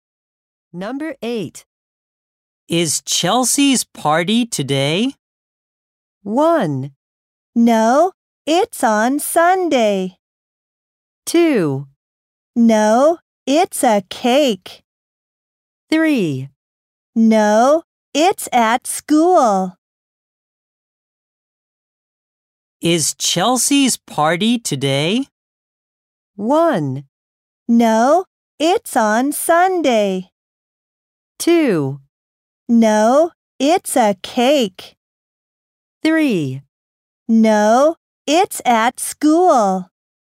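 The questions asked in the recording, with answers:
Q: Is Chelsea's party today?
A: 1: No, it's on Sunday.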